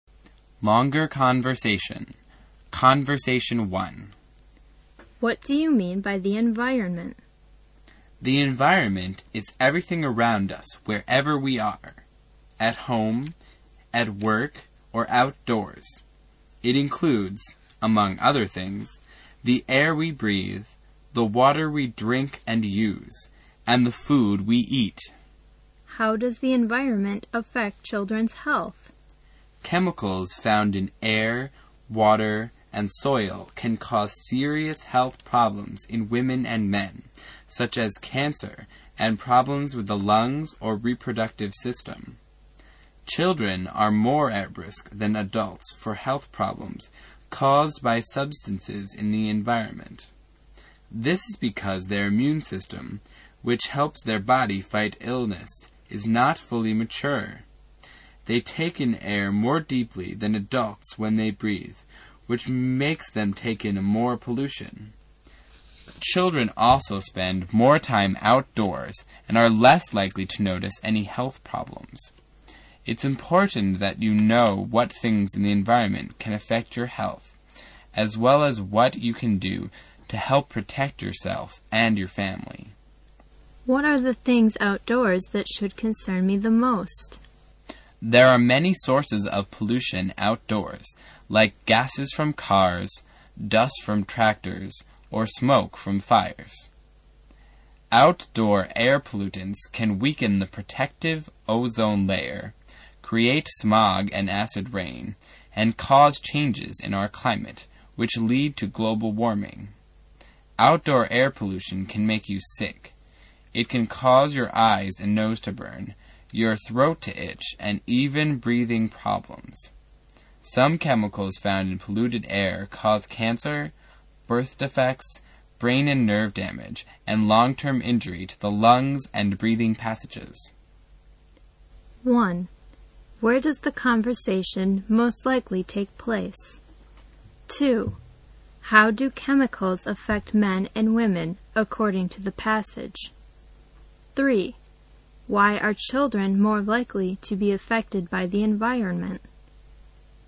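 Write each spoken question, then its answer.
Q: How do chemicals affect men and women according to the passage?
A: They can cause serious health problems, such as cancer and problems with the lungs or reproductive system

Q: Why are children more likely to be affected by the environment?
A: Their immune system is not fully mature, they breathe in air more deeply, and they spend more time outdoors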